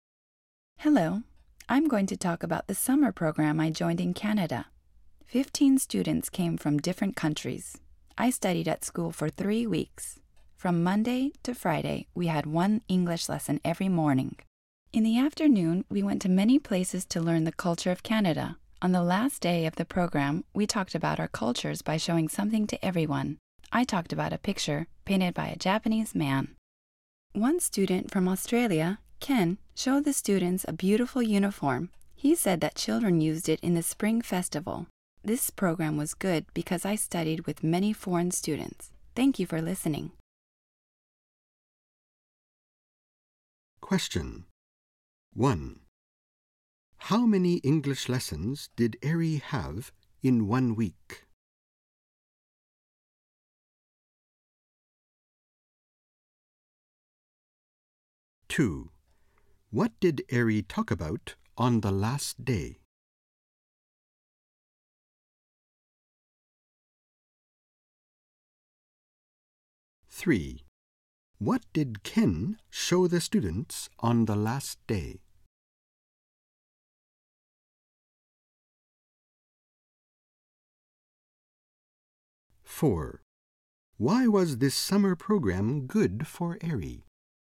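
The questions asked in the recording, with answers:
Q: How many English lessons did Eri have in 1 week?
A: Five

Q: What did Eri talk about on the last day?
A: A picture painted by a Japanese man

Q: What did Ken show the students on the last day?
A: A beautiful uniform

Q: Why was this summer program good for Eri?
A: Because she studied with many foreign students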